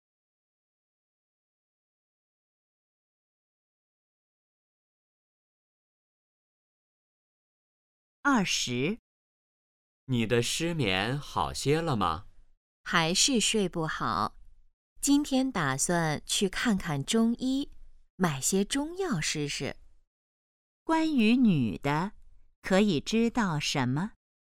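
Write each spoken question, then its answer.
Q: 关于女的,可以知道什么?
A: 她失眠,打算去看中医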